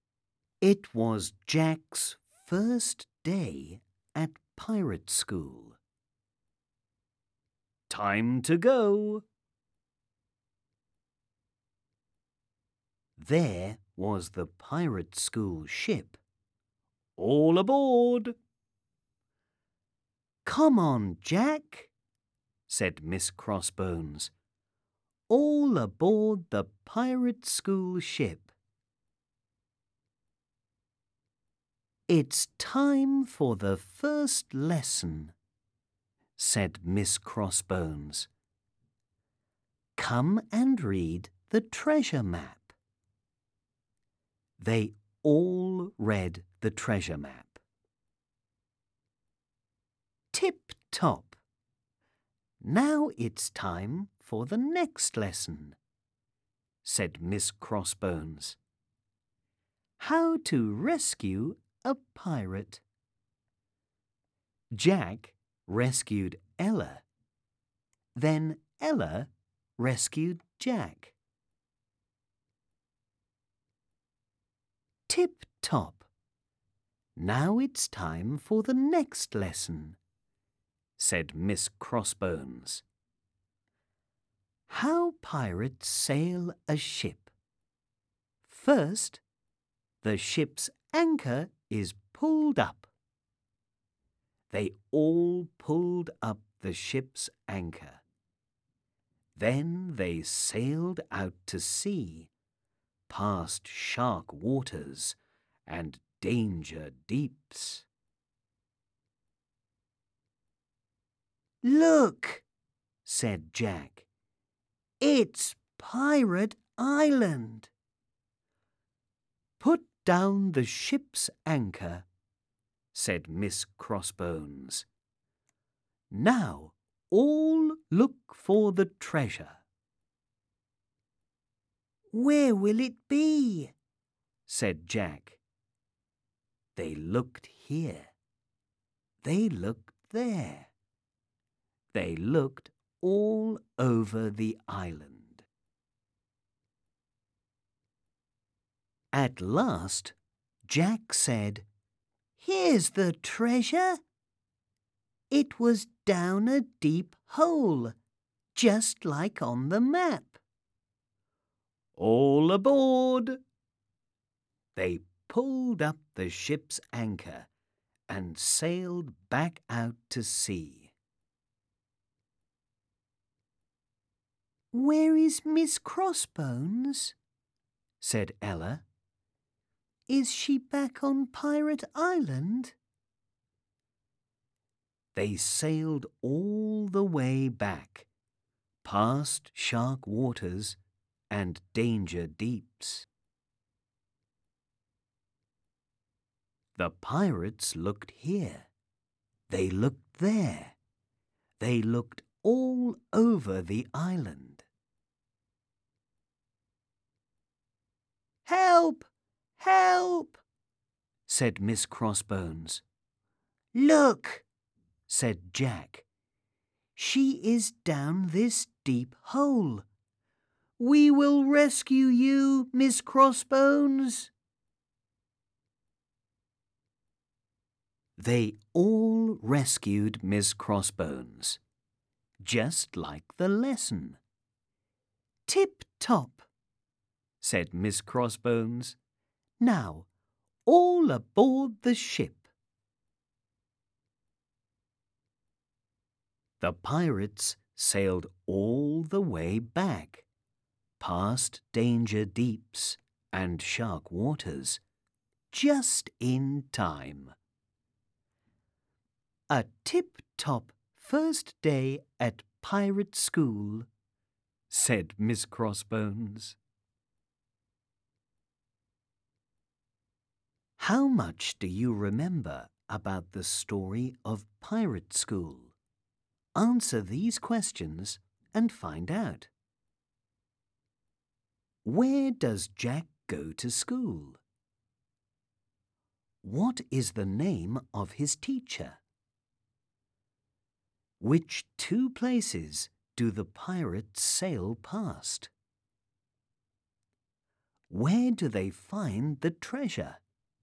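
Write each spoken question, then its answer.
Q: Where does Jack go to school?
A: Pirate school

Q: What is the name of his teacher?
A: Miss Crossbones

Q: Which two places do the pirates sail past?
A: Shark waters and danger deeps

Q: Where do they find the treasure?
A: Down a deep hole on Pirate Island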